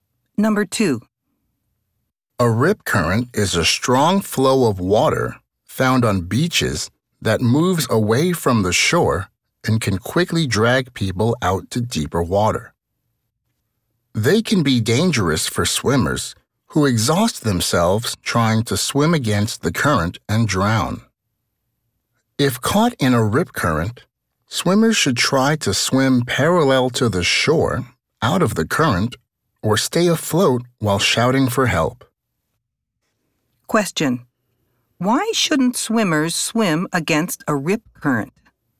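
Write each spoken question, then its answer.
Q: Why shouldn't swimmers swim against a rip current?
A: Because they can exhaust themselves and drown.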